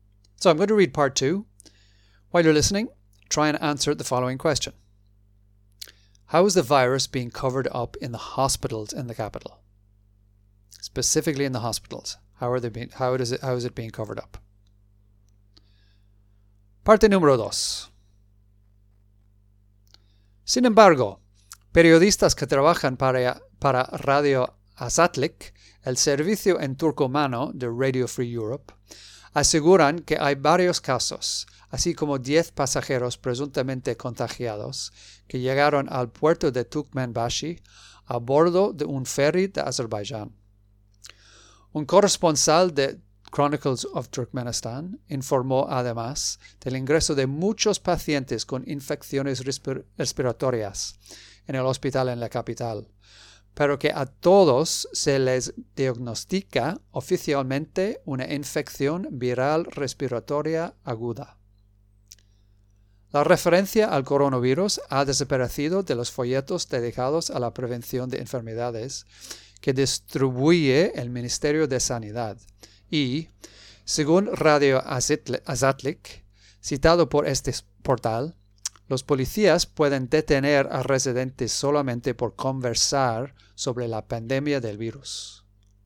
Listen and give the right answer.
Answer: So they're all being diagnosed with a viral respiratory infection.